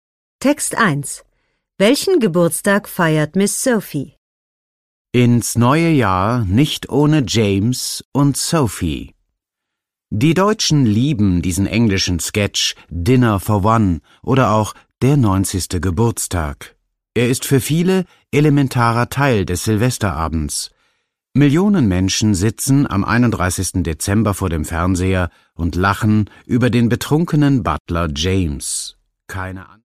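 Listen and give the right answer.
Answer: den 90. Geburtstag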